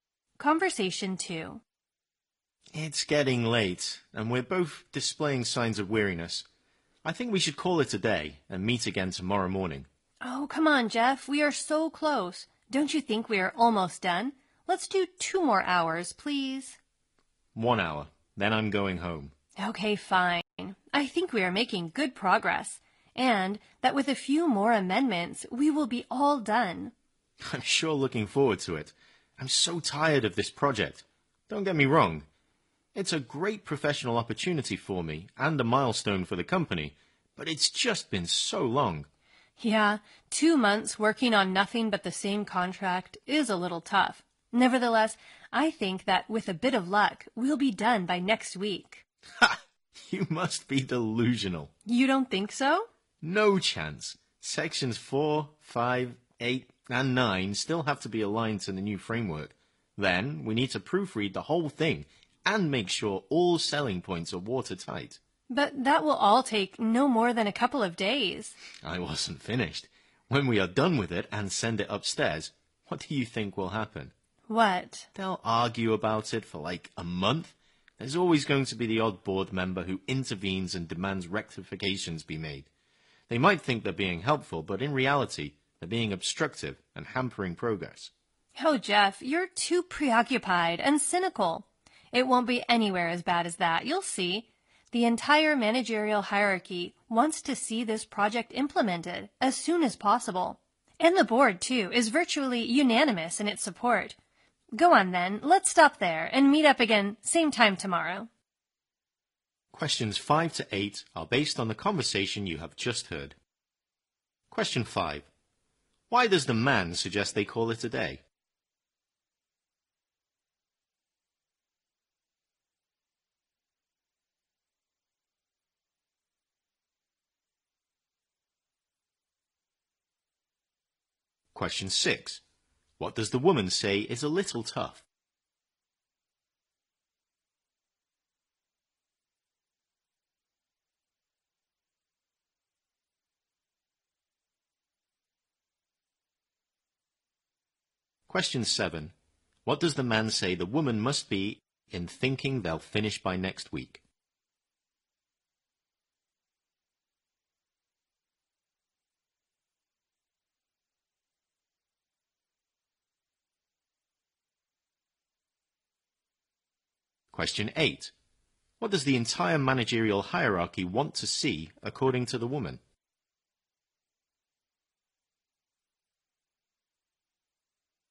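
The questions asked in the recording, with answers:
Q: Why does the man suggest they call it a day?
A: It's getting late and they're both showing signs of weariness

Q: What does the woman say is a little tough?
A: Working two months on nothing but the same contract

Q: What does the man say the woman must be in thinking they'll finish by next week?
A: Delusional

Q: What does the entire managerial hierarchy want to see, according to the woman?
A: The project implemented as soon as possible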